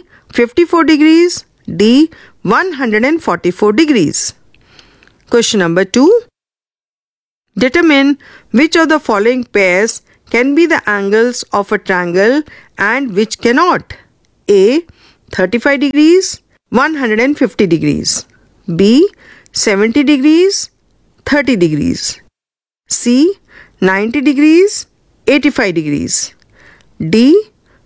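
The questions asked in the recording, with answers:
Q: 35 degrees, 150 degrees.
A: Cannot (sum is 185 degrees)

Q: 70 degrees, 30 degrees.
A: Can

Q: 90 degrees, 85 degrees.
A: Can (sum is 175 degrees)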